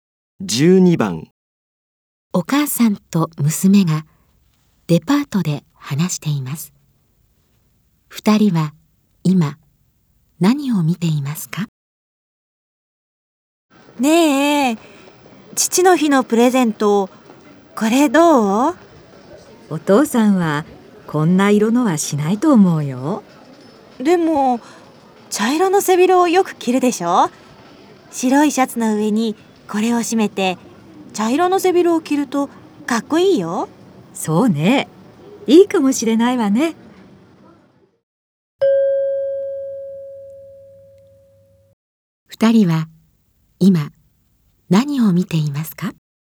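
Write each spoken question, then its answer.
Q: 二人は今何を見ていますか?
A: ネクタイ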